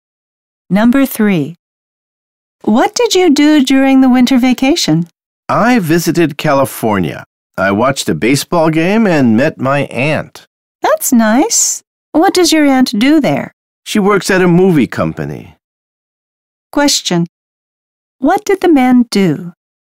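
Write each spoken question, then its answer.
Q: What did the man do?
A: He visited California, watched a baseball game and met his aunt.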